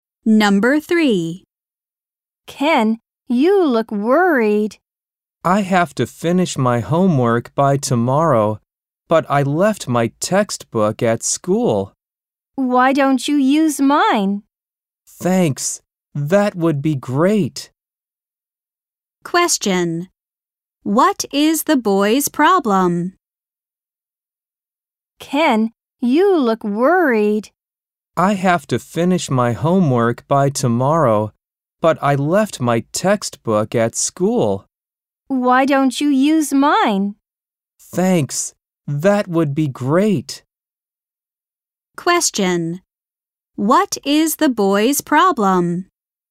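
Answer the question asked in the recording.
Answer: He left his textbook at school.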